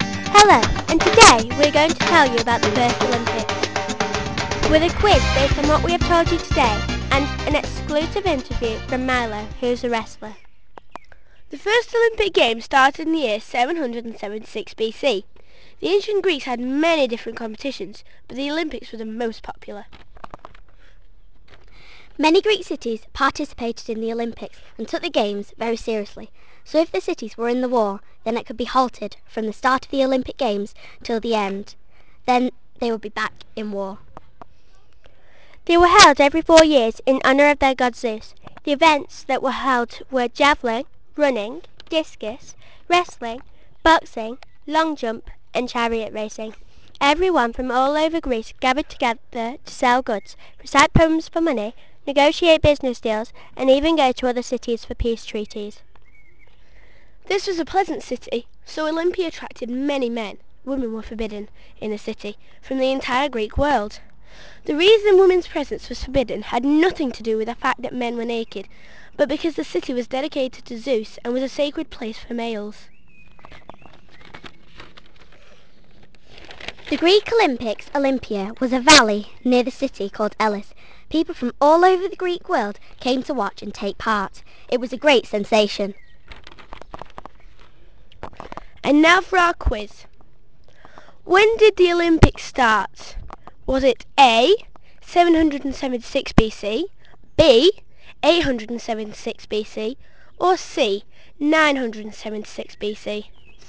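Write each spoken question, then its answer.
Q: When did the Olympics start?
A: A: 776 BC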